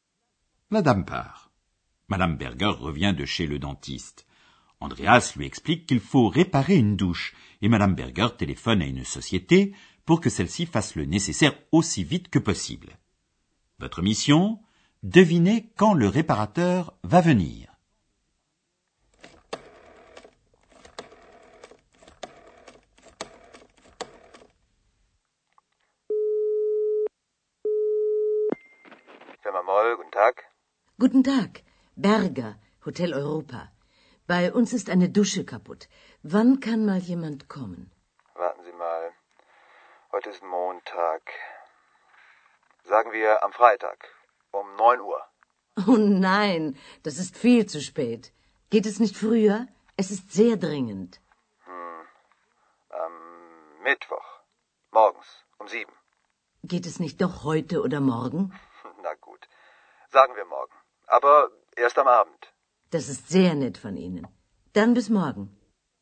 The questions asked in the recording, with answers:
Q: Devinez quand le réparateur va venir.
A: Madame Berger a finalement réussi à faire venir le réparateur le lendemain soir.